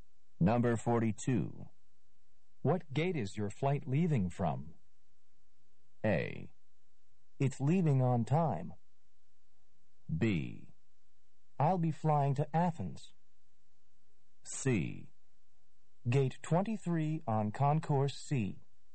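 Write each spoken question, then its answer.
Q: What gate is your flight leaving from?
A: C: Gate 23 on Concourse C.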